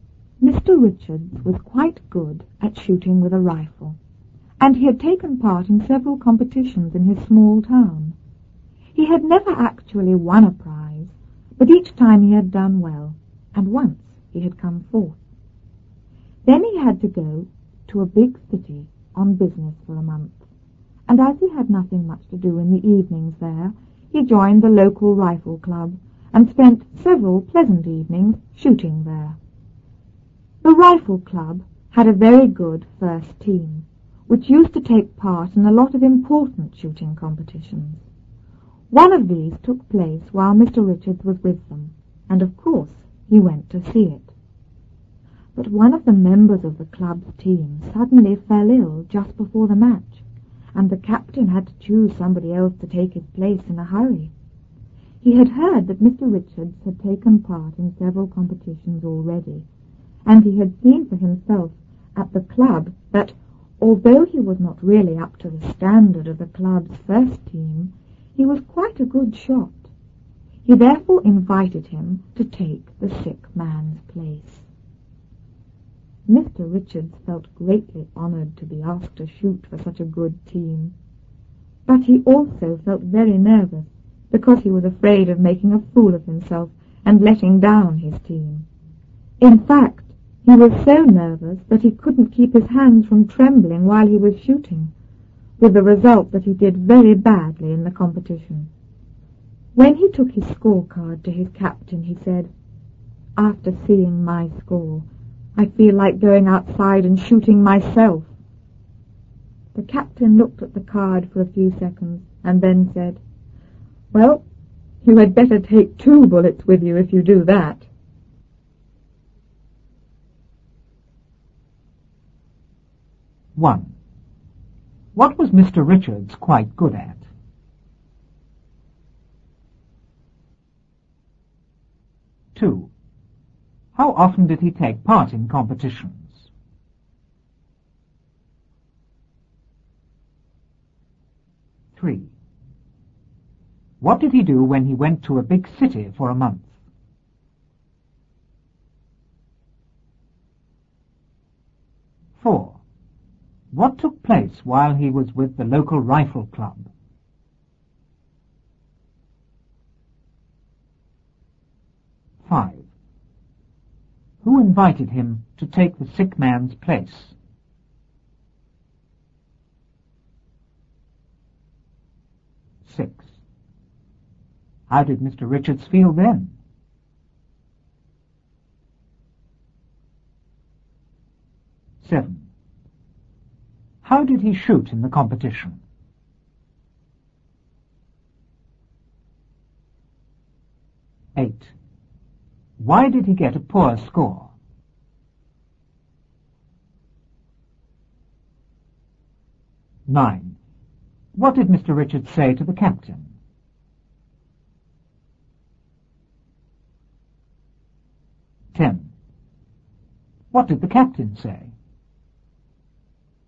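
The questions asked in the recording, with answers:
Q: What was Mr. Richards quite good at?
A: Shooting with a rifle

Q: How often did he take part in competitions?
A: He had taken part in several competitions

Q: What did he do when he went to a big city for a month?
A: He joined the local rifle club and spent evenings shooting there

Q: What took place while he was with the local rifle club?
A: An important shooting competition

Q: Who invited him to take the sick man's place?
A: The captain of the team

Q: How did Mr. Richards feel then?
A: Greatly honored but very nervous

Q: How did he shoot in the competition?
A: Very badly

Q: Why did he get a poor score?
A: He was so nervous his hands trembled while shooting

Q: What did Mr. Richards say to the captain?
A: After seeing my score, I feel like going outside and shooting myself

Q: What did the captain say?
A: You had better take two bullets with you if you do that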